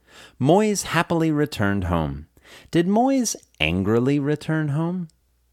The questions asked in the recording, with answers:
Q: Did Moyes angrily return home?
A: No, Moyes didn't angrily return home.